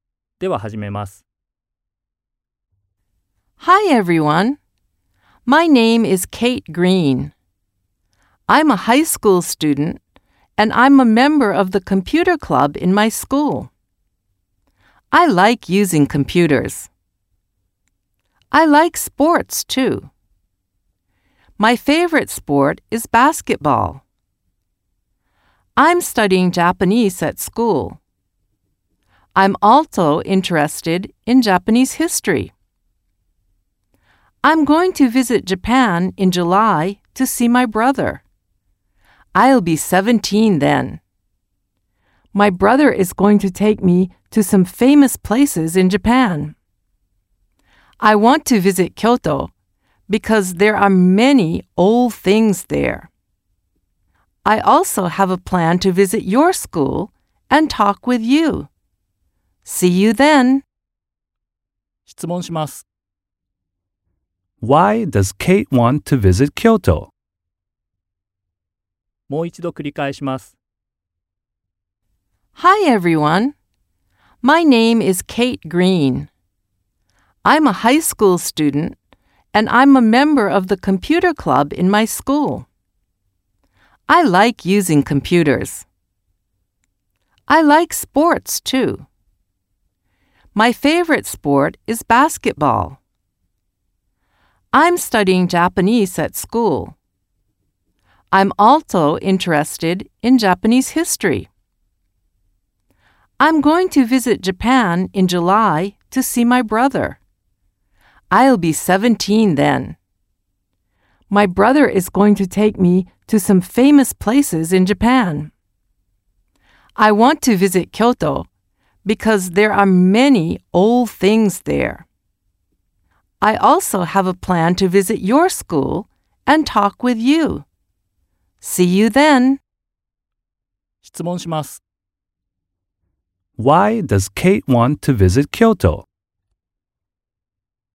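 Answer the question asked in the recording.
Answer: Because there are many old things there.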